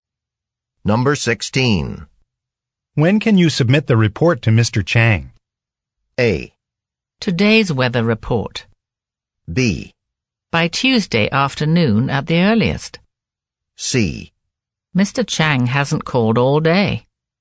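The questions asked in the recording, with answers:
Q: When can you submit the report to Mr. Chang?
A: B: By Tuesday afternoon at the earliest.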